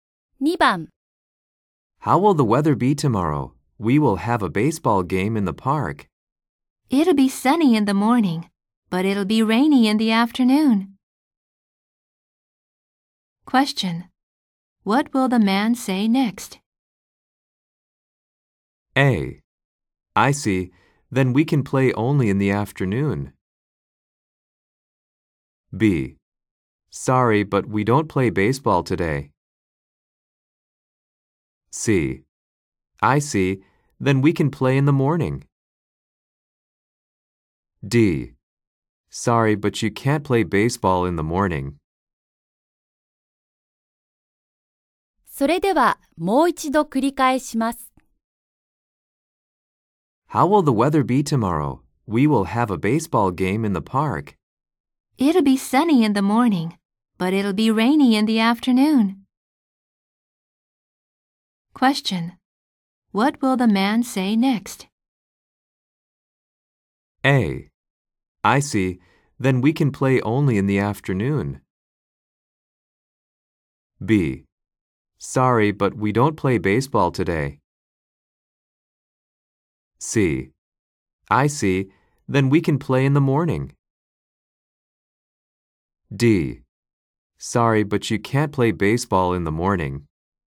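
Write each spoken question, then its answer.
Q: What will the man say next?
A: C: I see. Then we can play in the morning.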